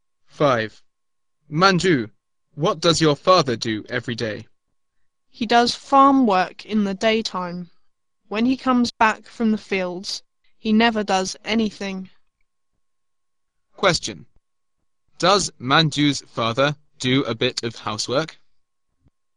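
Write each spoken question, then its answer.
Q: Does Manju's father do a bit of housework?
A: No, he doesn't.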